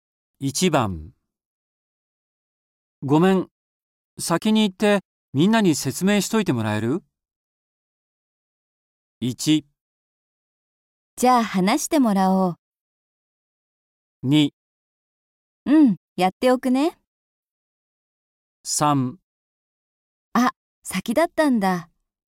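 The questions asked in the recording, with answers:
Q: ごめん、先に行ってみんなに説明しといてもらえる?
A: 2: うん、やっておくね。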